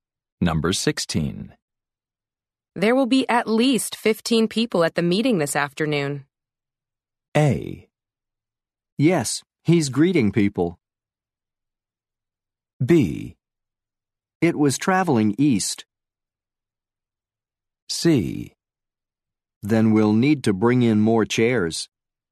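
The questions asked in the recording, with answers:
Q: There will be at least 15 people at the meeting this afternoon.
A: C: Then we'll need to bring in more chairs.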